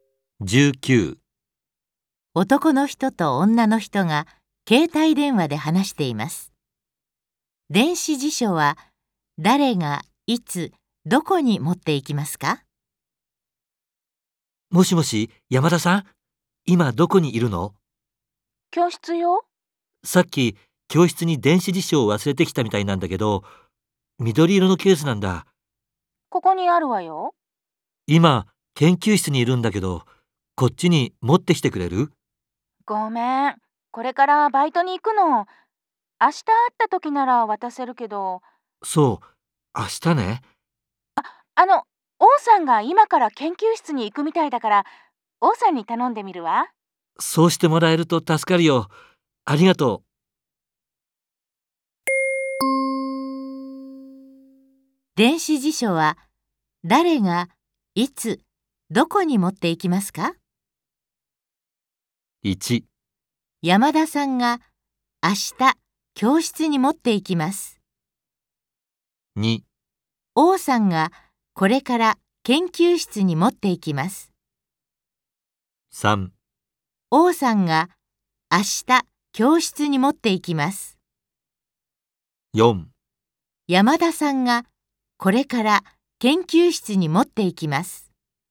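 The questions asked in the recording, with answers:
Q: 電子辞書は誰がいつどこに持っていきますか?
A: 2: 王さんがこれから研究室に持っていきます。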